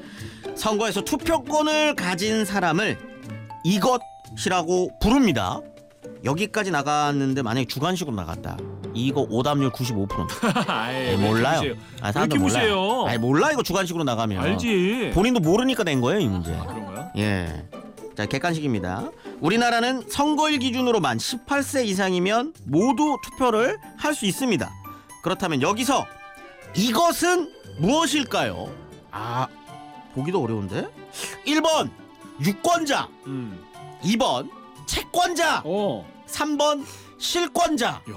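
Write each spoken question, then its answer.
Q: 선거에서 투표권을 가진 사람을 이것이라고 부릅니다.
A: 1번: 유권자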